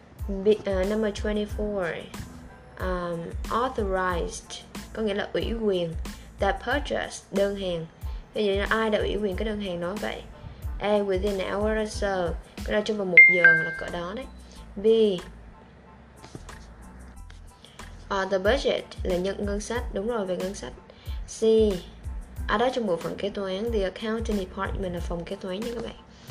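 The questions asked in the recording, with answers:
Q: Vậy là ai đã ủy quyền cái đơn hàng đó vậy?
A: C: Trong bộ phận kế toán.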